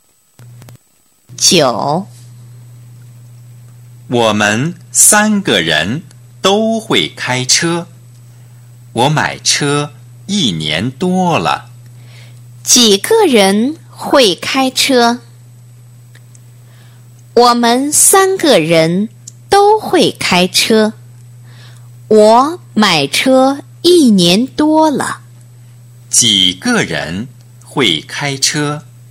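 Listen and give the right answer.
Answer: 三个人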